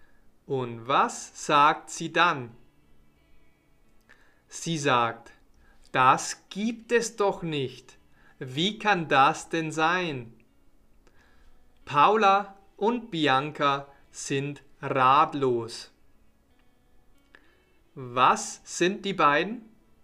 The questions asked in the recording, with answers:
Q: Was sind die beiden?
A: Ratlos. Sie sind ratlos.